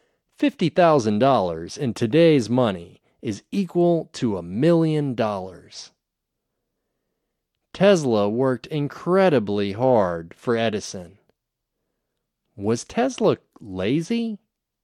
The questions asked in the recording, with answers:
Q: Was Tesla lazy?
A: No, Tesla wasn't lazy. He worked incredibly hard.